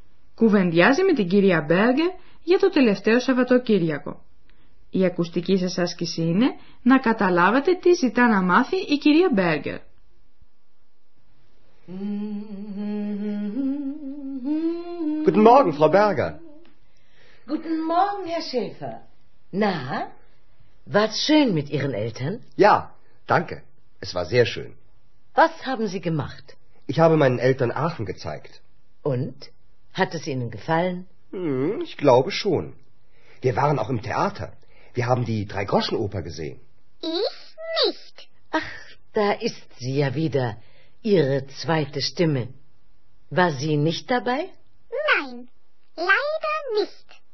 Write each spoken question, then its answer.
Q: Η ακουστική σας άσκηση είναι να καταλάβετε τι ζητά να μάθει η κυρία Μπέργκε.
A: Η κυρία Μπέργκερ θέλει να μάθει τι έκανε ο Ανδρέας με τους γονείς του και αν τους άρεσε το Άχαν.